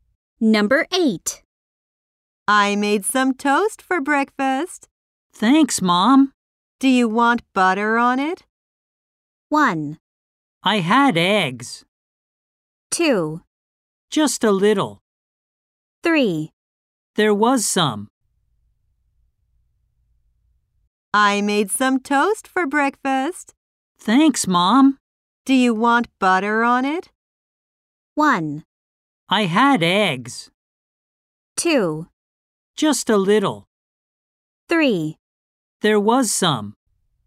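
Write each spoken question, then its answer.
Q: Do you want butter on it?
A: 2: Just a little.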